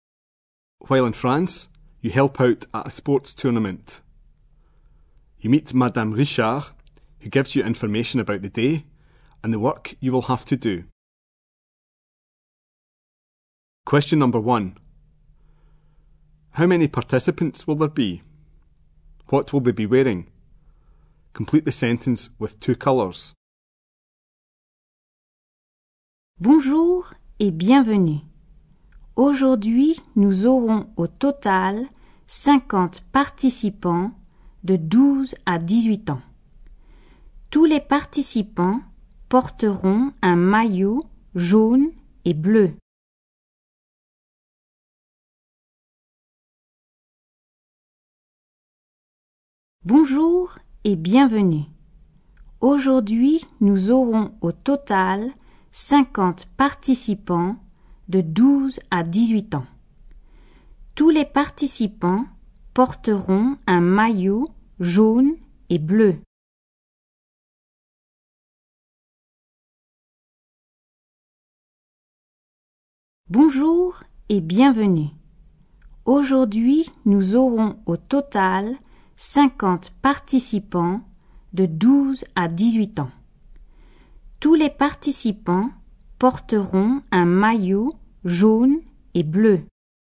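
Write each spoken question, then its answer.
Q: How many participants will there be?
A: 50

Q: What will they be wearing?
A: A yellow and blue top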